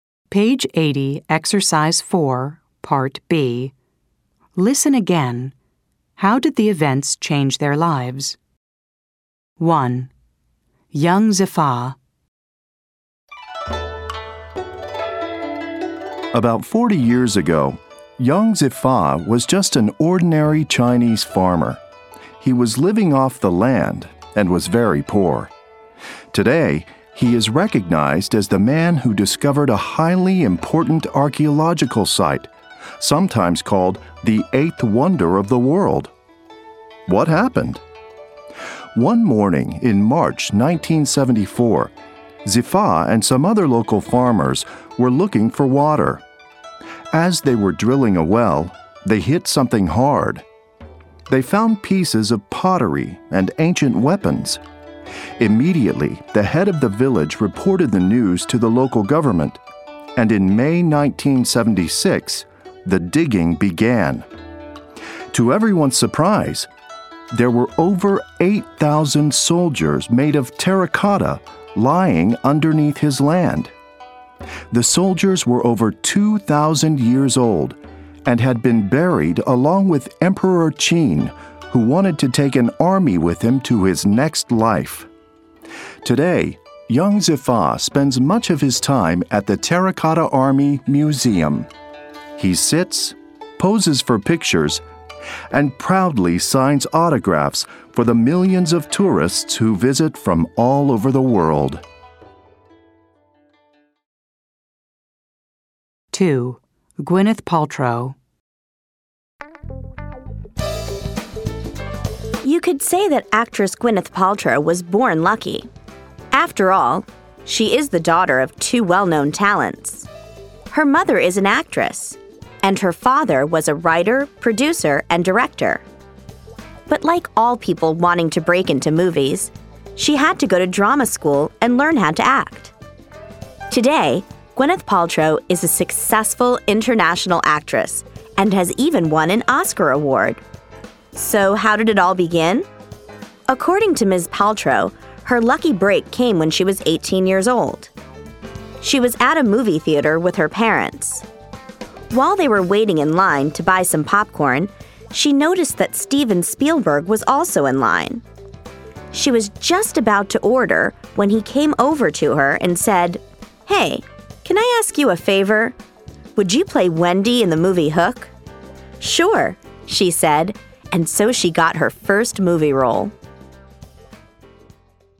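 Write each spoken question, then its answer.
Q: How did the events change their lives?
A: Young Zifa went from a poor ordinary farmer to being recognized as the man who discovered the Terracotta Army; he now signs autographs at the museum

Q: How did the events change their lives?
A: Gwyneth Paltrow met Steven Spielberg in a popcorn line, got her first movie role (Wendy in Hook), and became a successful Oscar-winning actress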